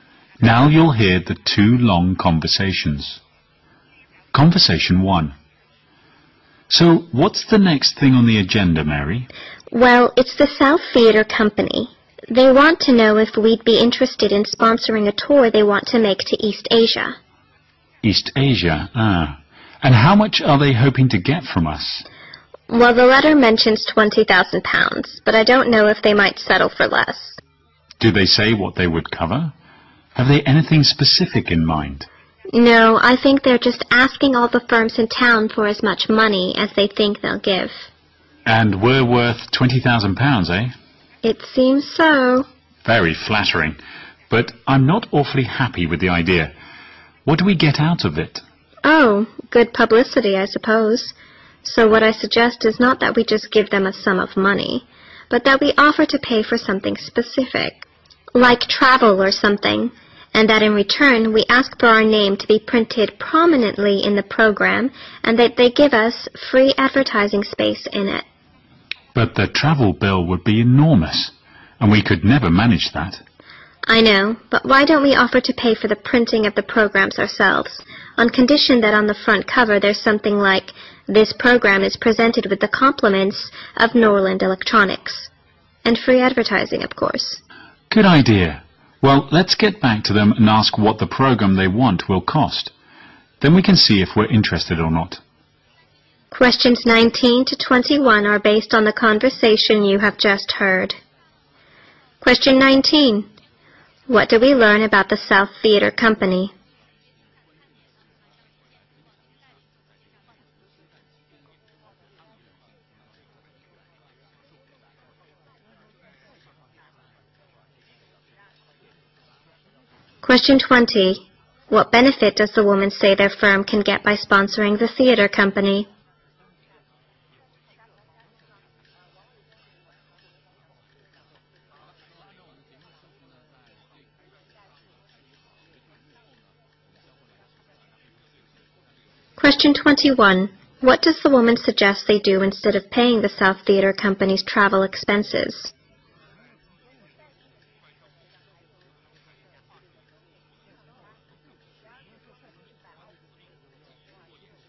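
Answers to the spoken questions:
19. It wants sponsorship for a tour of East Asia
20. Good publicity
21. Pay for printing the programs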